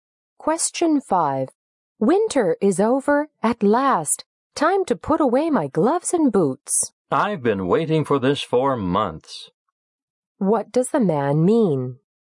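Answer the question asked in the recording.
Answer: He is glad that winter is finally over.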